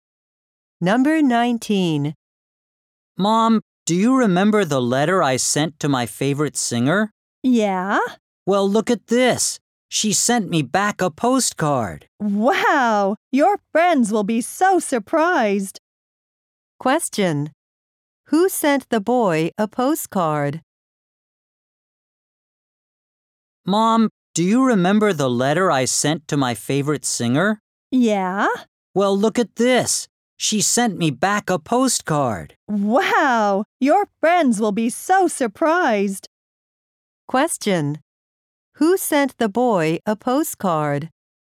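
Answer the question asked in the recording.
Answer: His favorite singer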